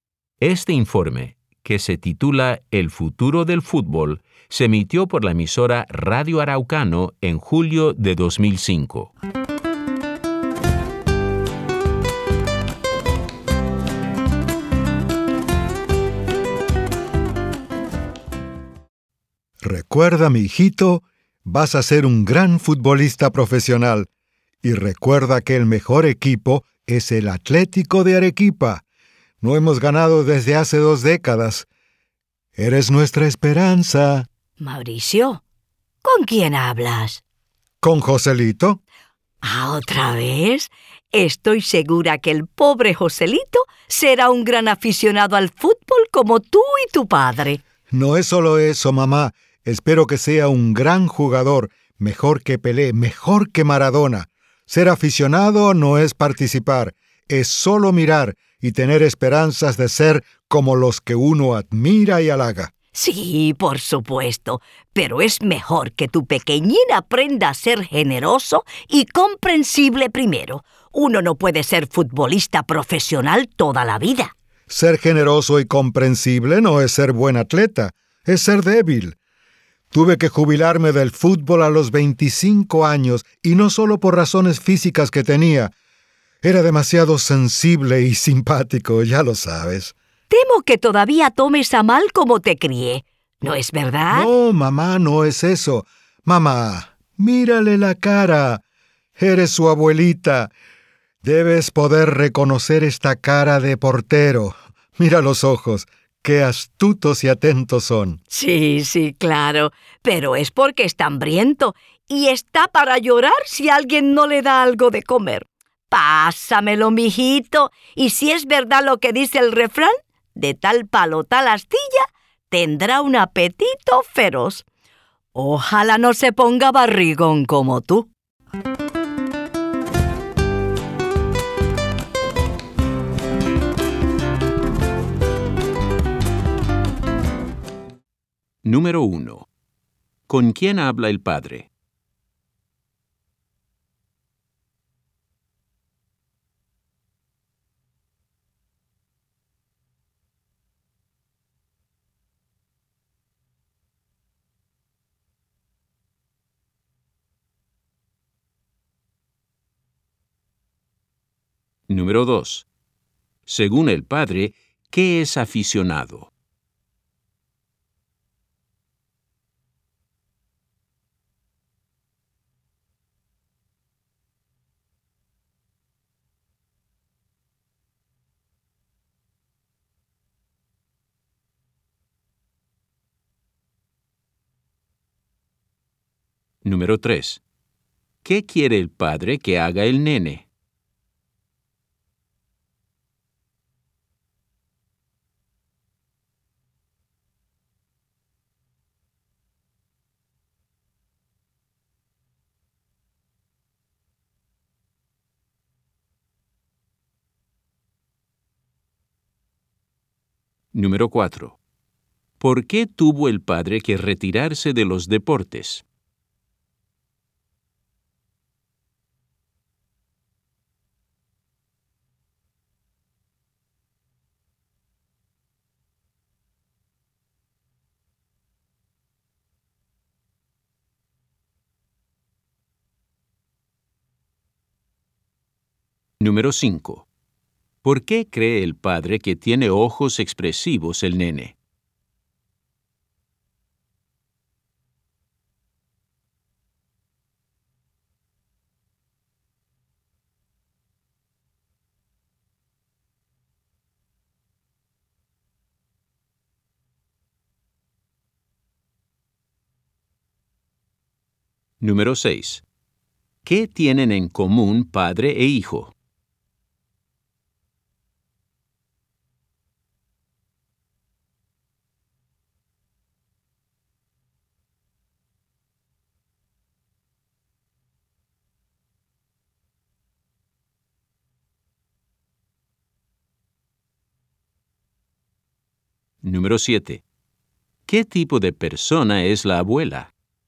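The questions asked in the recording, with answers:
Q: ¿Con quién habla el padre?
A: Con su hijo bebé, Joselito

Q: ¿Qué quiere el padre que haga el nene?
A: Que sea un gran futbolista profesional, mejor que Pelé y Maradona

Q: ¿Por qué tuvo el padre que retirarse de los deportes?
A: Por razones físicas y porque era demasiado sensible y simpático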